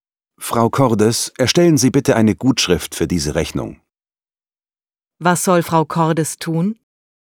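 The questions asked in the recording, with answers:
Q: Was soll Frau Cordes tun?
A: Eine Gutschrift für die Rechnung erstellen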